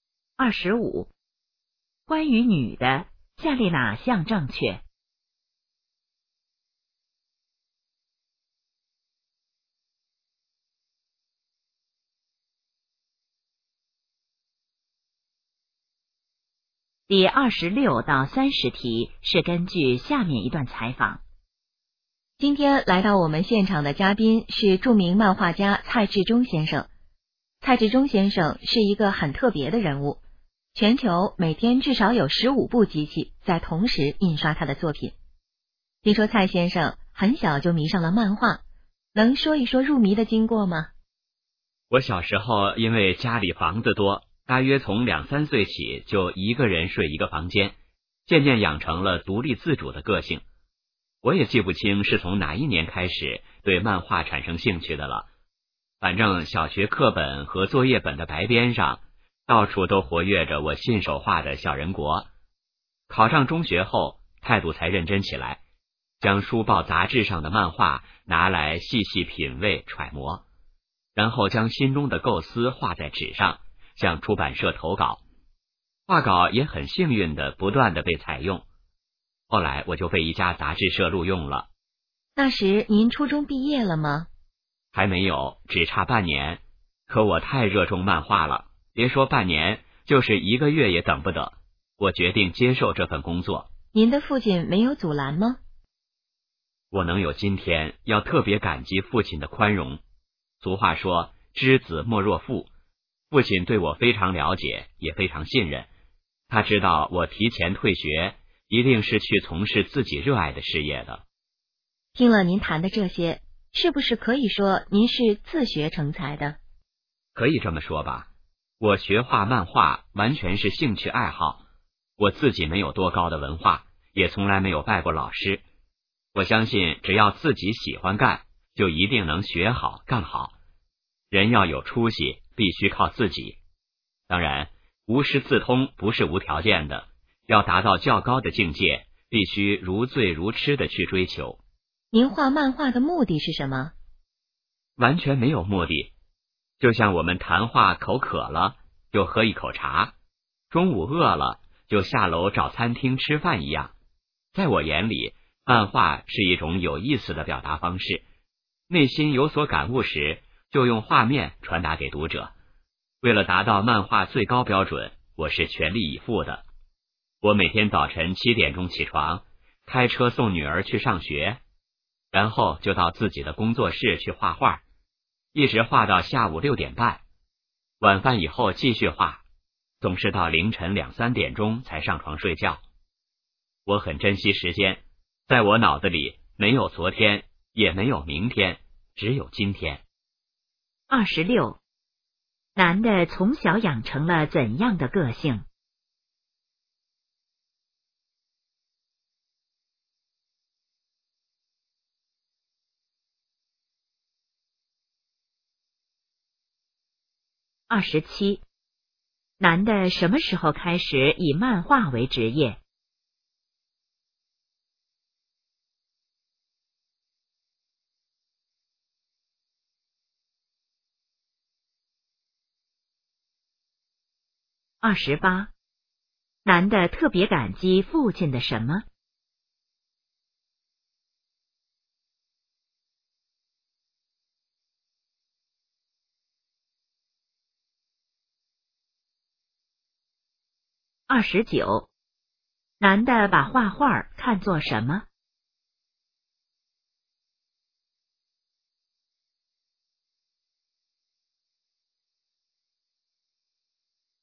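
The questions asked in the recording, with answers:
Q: 男的从小养成了怎样的个性?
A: 独立自主

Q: 男的什么时候开始以漫画为职业?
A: 初中毕业前半年

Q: 男的特别感激父亲的什么?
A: 宽容

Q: 男的把画画看作什么?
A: 一种有意思的表达方式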